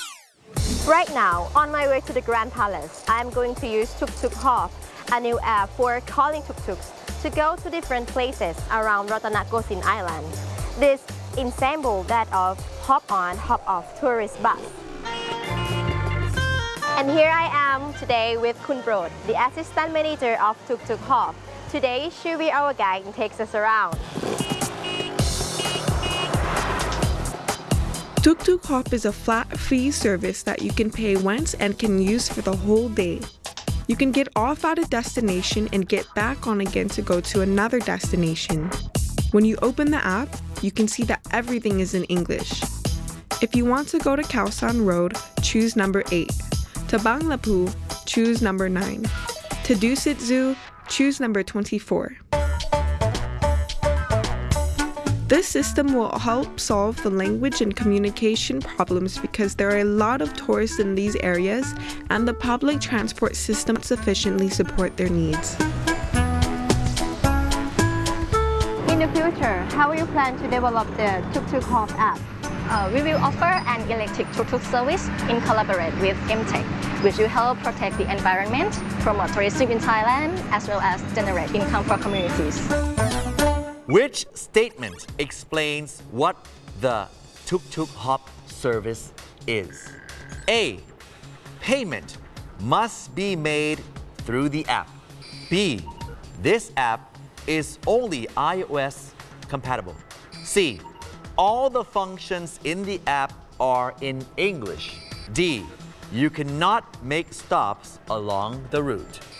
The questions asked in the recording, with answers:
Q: Which statement explains what the Tuk Tuk Hop service is?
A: C. All the functions in the apps are in English.